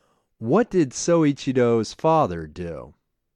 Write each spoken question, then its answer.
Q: What did Soichiro's father do?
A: Soichiro's father was a blacksmith.